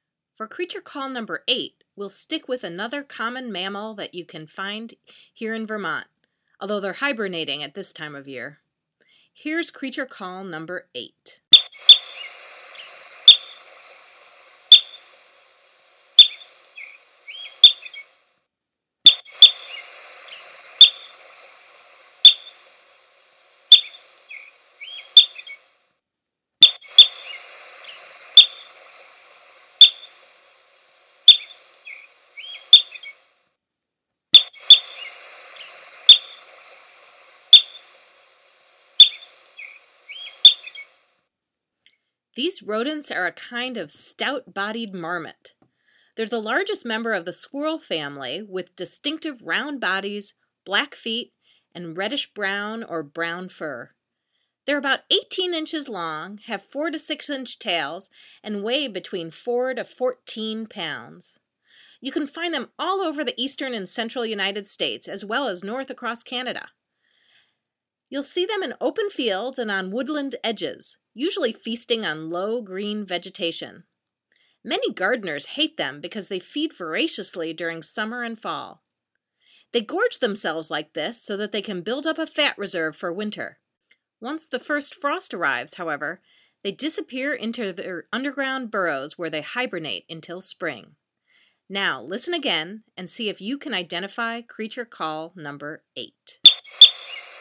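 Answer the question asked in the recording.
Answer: groundhog (woodchuck)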